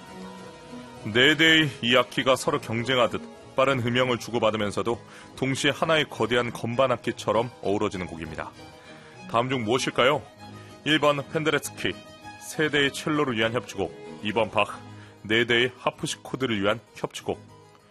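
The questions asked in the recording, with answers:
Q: 다음 중 무엇일까요? 1번 펜데레츠키, 세 대의 첼로를 위한 협주곡, 2번 바흐, 네 대의 하프시코드를 위한 협주곡.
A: 2번: 바흐, 네 대의 하프시코드를 위한 협주곡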